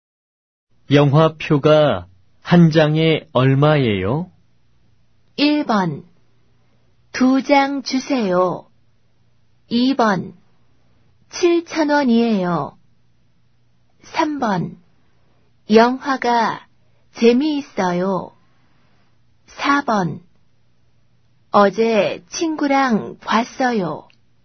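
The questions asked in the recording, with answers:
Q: 영화표가 한 장에 얼마예요?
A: 2: 7천 원이에요.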